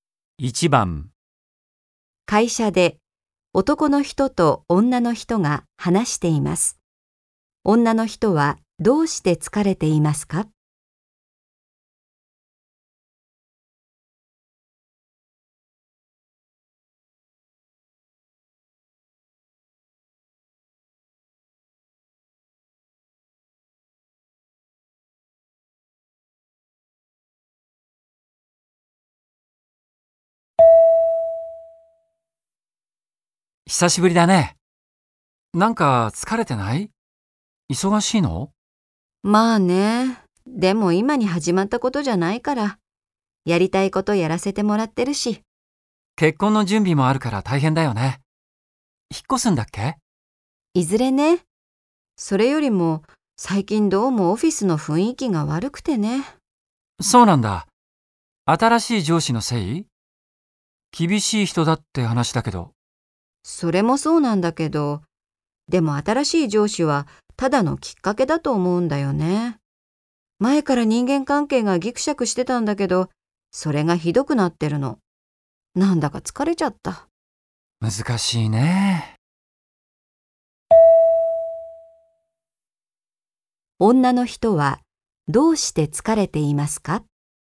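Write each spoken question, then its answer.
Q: 女の人はどうして疲れていますか?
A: 職場の人間関係が悪くなっていて、オフィスの雰囲気が悪いから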